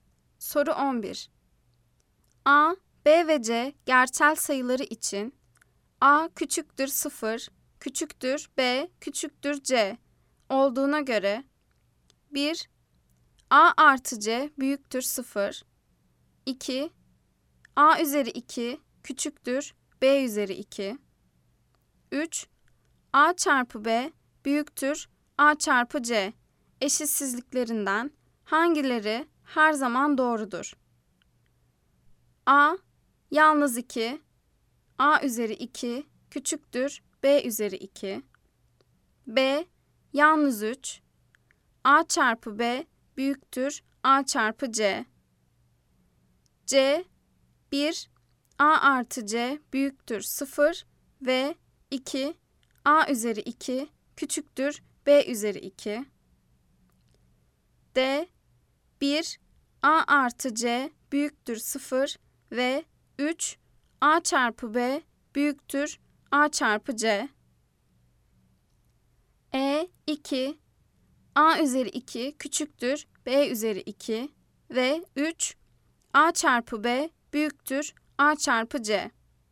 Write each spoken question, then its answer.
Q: 3. A çarpı B büyüktür A çarpı C eşitsizliklerinden hangileri her zaman doğrudur?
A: Cevap: Bolu, yalnız 3. A çarpı B büyüktür A çarpı C.